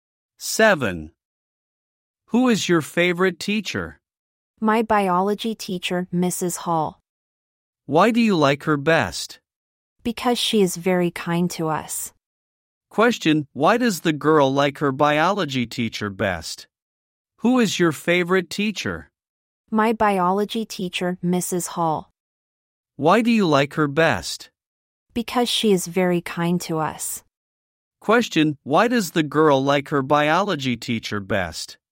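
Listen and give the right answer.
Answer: Because she is very kind to them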